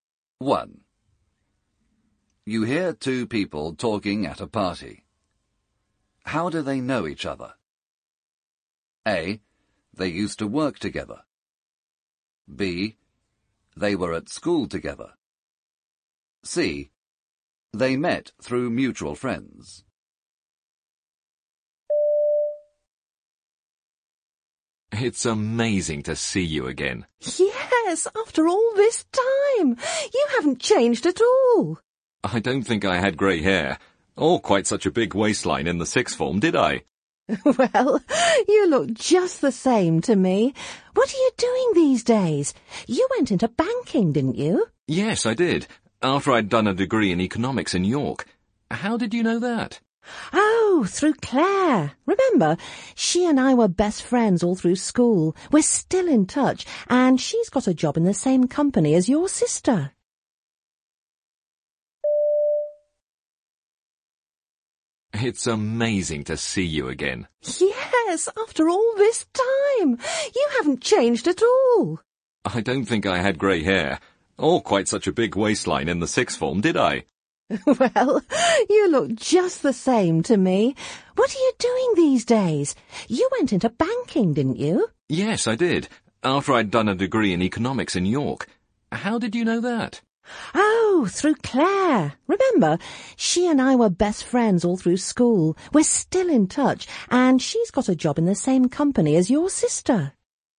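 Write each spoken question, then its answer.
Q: How do they know each other?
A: B: They were at school together.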